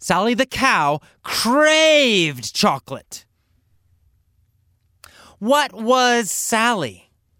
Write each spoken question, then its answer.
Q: What was Sally?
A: She was a cow. Sally was a cow.